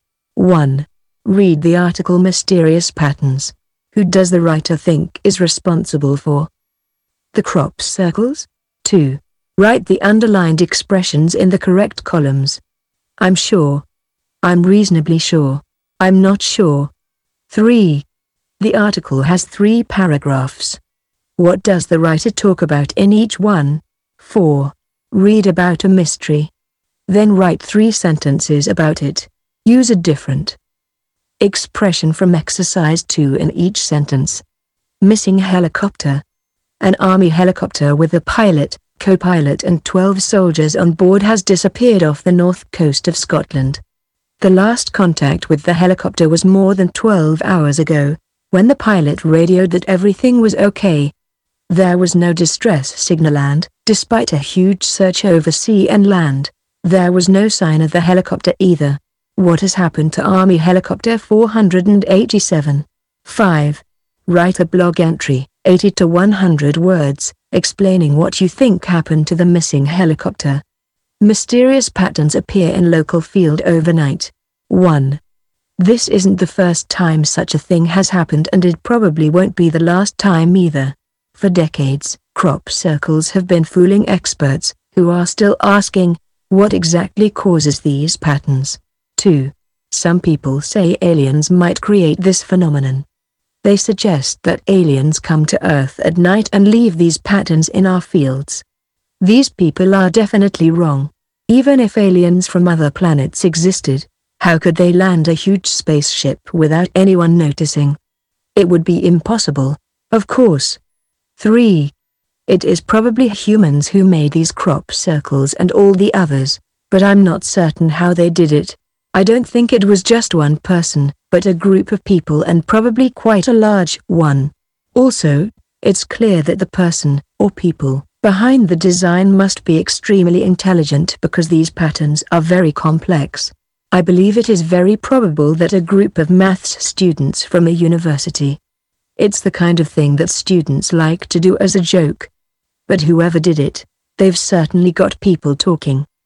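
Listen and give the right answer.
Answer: Humans, probably a group of maths students from a university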